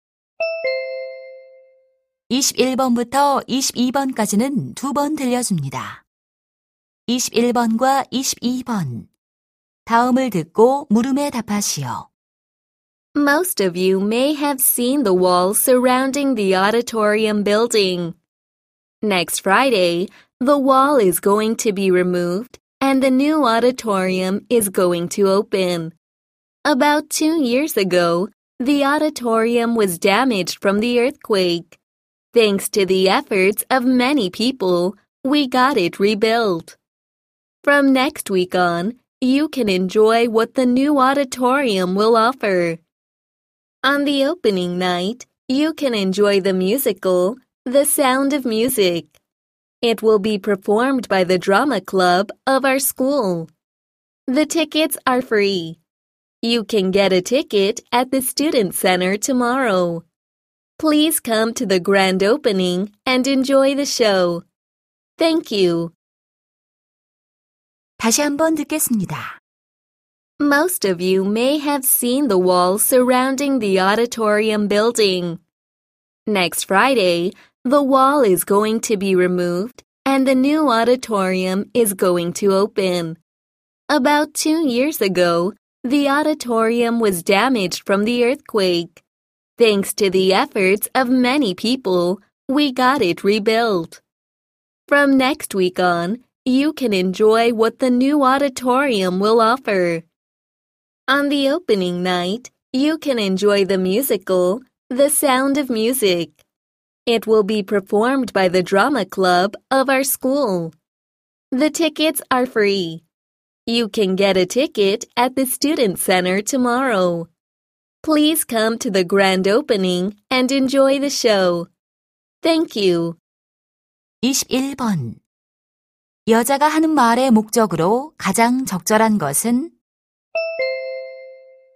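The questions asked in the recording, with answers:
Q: 여자가 하는 말의 목적으로 가장 적절한 것은?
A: 새 강당 개관 행사 안내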